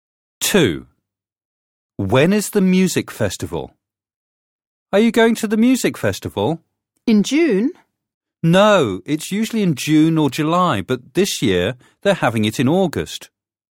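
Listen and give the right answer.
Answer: in August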